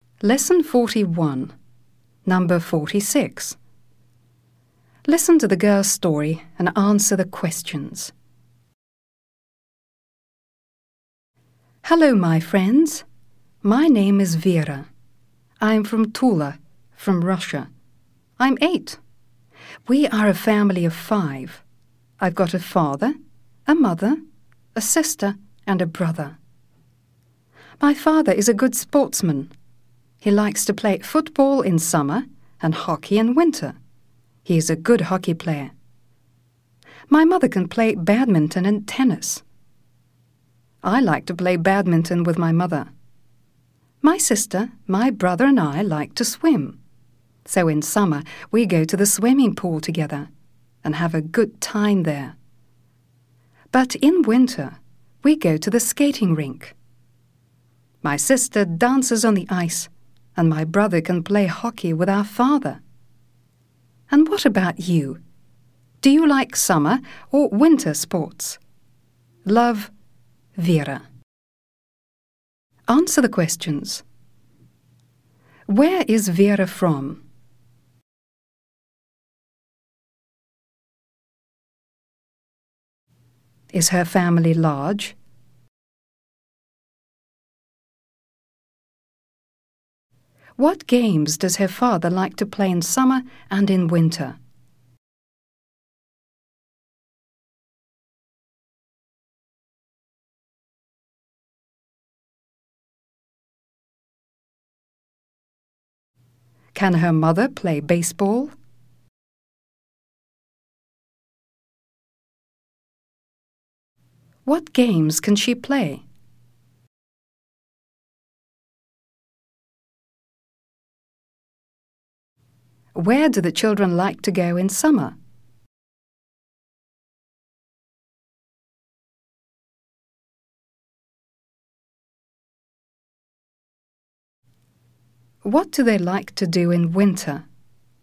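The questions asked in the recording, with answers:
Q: Where is Vera from?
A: From Tula, Russia

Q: What games does her father like to play in summer and in winter?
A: Football in summer and hockey in winter

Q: Can her mother play baseball?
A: No

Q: What games can she play?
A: Badminton and tennis

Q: Where do the children like to go in summer?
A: To the swimming pool

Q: What do they like to do in winter?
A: Go to the skating rink: the sister dances on the ice, the brother plays hockey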